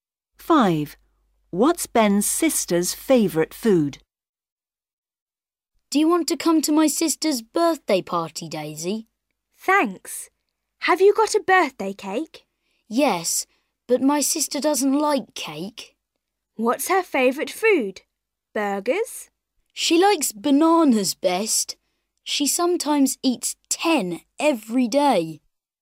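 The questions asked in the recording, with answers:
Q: What's Ben's sister's favourite food?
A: bananas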